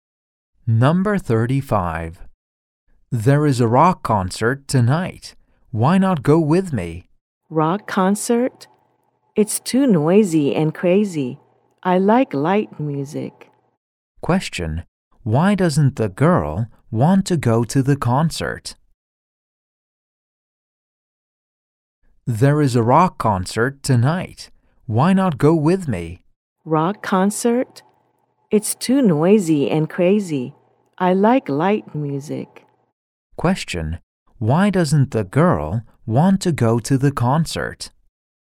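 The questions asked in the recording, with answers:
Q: Why doesn't the girl want to go to the concert?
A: Rock music is too noisy and crazy; she likes light music.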